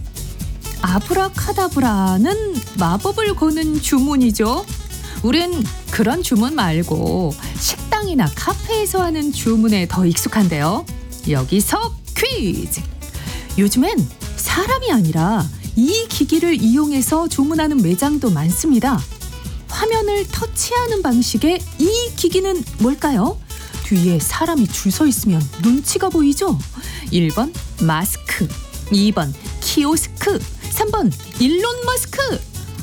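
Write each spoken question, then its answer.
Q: 화면을 터치하는 방식의 이 기기는 뭘까요?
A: 2번: 키오스크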